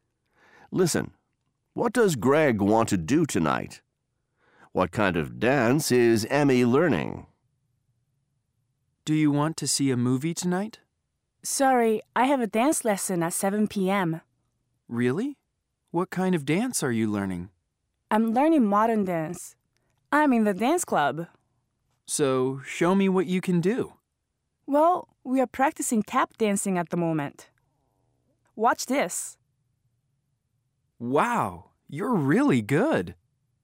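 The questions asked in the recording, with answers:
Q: What does Greg want to do tonight?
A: See a movie

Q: What kind of dance is Emmy learning?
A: Modern dance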